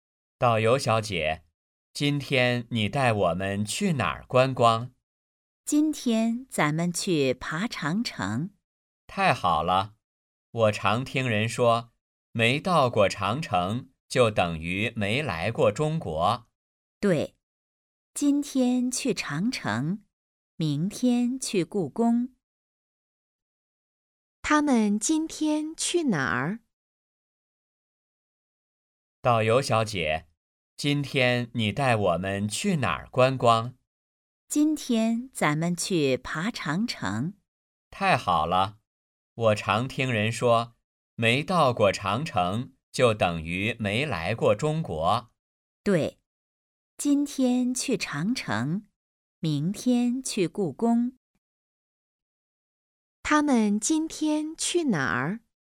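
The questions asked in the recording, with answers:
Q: 他们今天去哪儿?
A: 长城

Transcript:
男:导游小姐,今天你带我们去哪儿观光?
女:今天咱们去爬长城。
男:太好了!我常听人说,没到过长城就等于没来过中国。
女:对。今天去长城,明天去故宫。
问:他们今天去哪儿?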